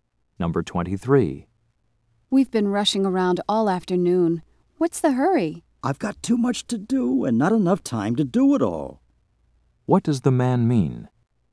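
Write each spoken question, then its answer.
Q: What does the man mean?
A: He has too much to do in too little time.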